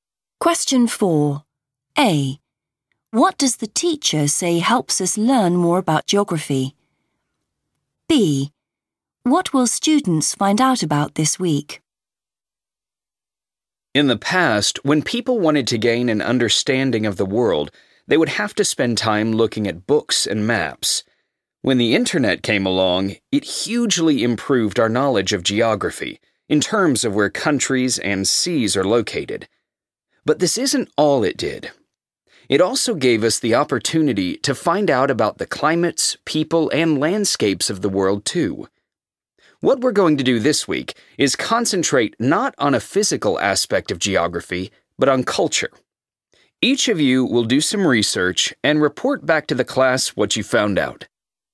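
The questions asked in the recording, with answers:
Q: What does the teacher say helps us learn more about geography?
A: the internet

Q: What will students find out about this week?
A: culture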